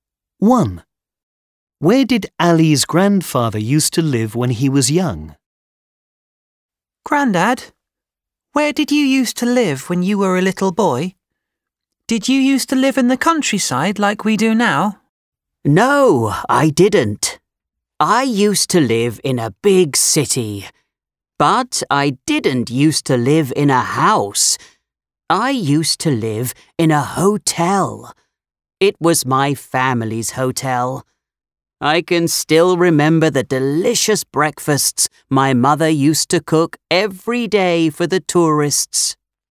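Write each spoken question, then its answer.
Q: Where did Ali's grandfather used to live when he was young?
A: In a hotel (his family's hotel) in a big city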